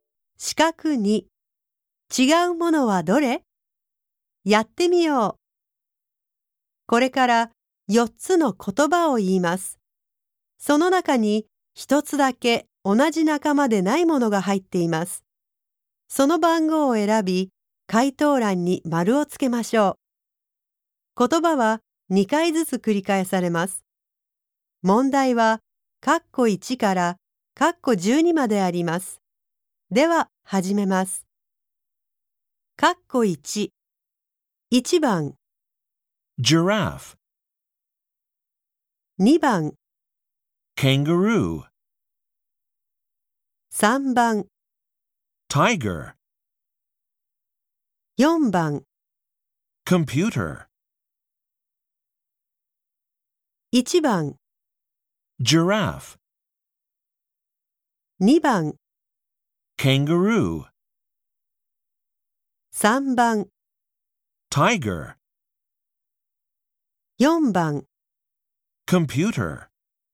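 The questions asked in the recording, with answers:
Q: 違うものはどれ?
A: 4: Computer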